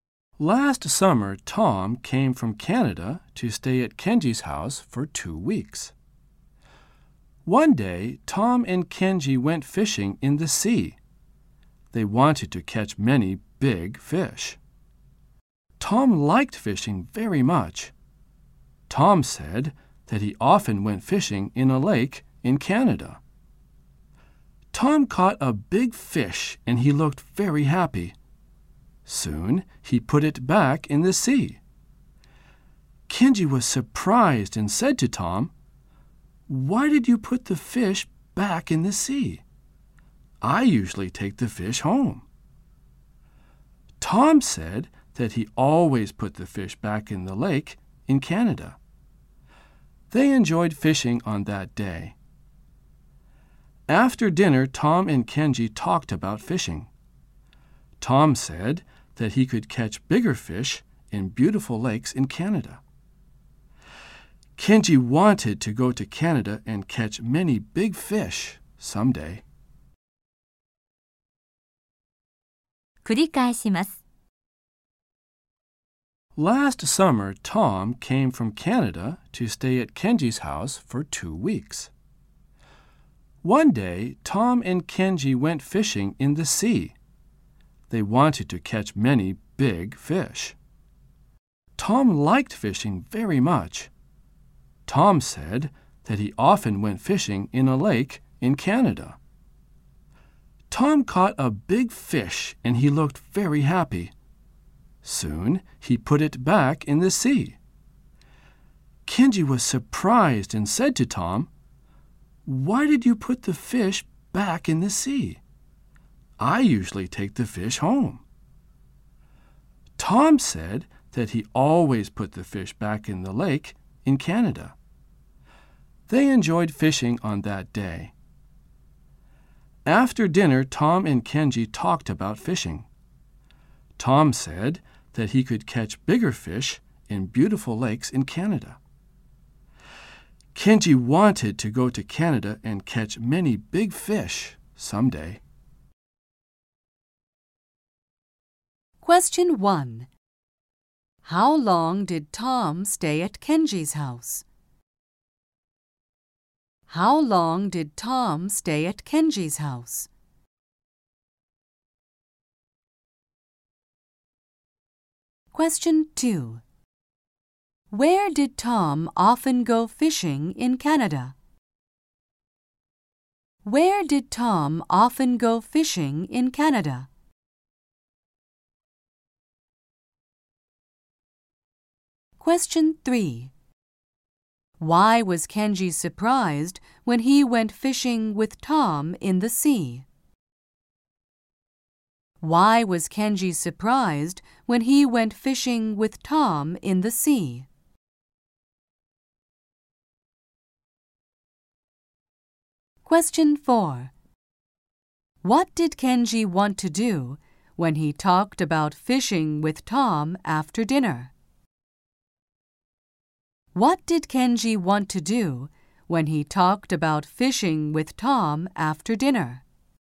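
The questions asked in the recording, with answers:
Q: How long did Tom stay at Kenji's house?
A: For 2 weeks

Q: Where did Tom often go fishing in Canada?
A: In a lake

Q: Why was Kenji surprised when he went fishing with Tom in the sea?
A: Because Tom put the big fish he caught back in the sea

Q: What did Kenji want to do when he talked about fishing with Tom after dinner?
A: He wanted to go to Canada and catch many big fish someday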